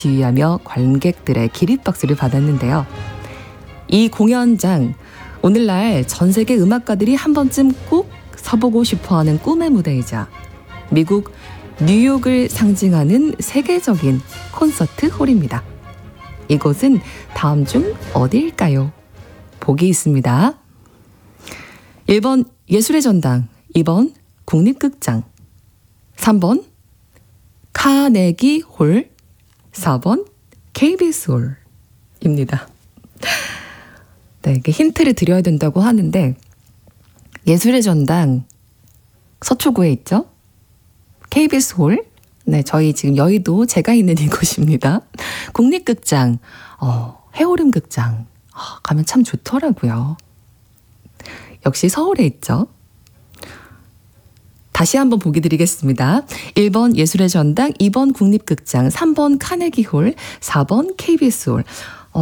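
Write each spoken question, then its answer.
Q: 이곳은 다음 중 어디일까요?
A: 3번: 카네기 홀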